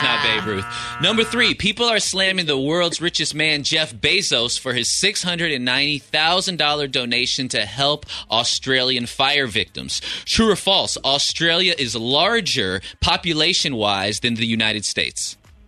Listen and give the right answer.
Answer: False.